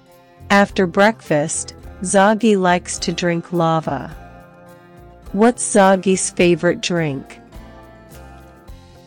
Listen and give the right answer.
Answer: Lava. His favorite drink is lava.